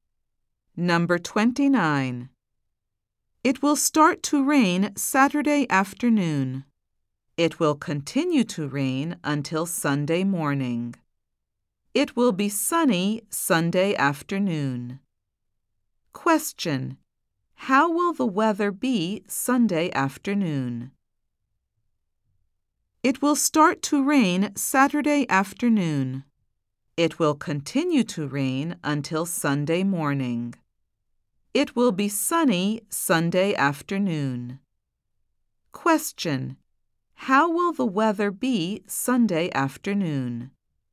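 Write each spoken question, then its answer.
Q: How will the weather be Sunday afternoon?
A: Sunny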